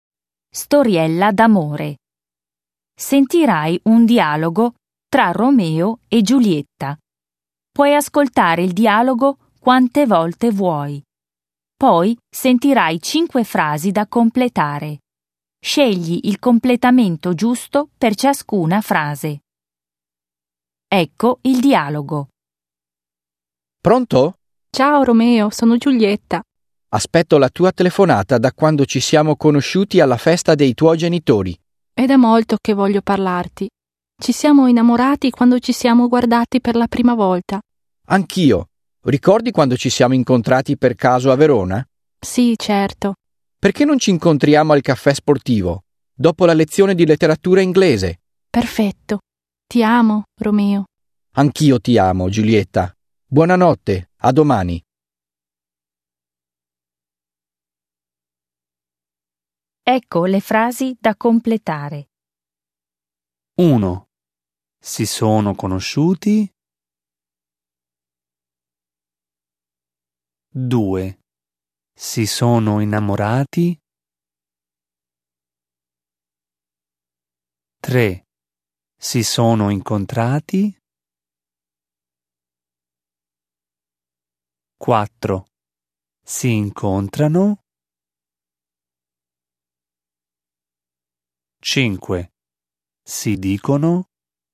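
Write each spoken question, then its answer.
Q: Si sono conosciuti.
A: alla festa dei genitori di Romeo

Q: Si sono innamorati.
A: quando si sono guardati per la prima volta

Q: Si sono incontrati.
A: per caso a Verona

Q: Si incontrano.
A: al caffè sportivo, dopo la lezione di letteratura inglese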